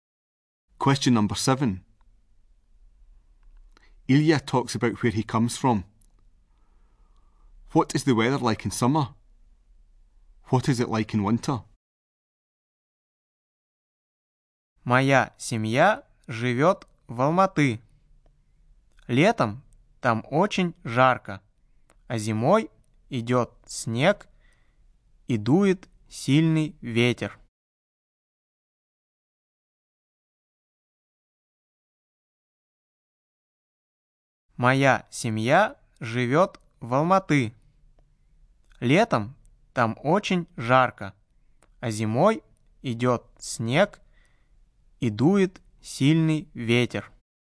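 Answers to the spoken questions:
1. Very hot
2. It snows and there is a strong wind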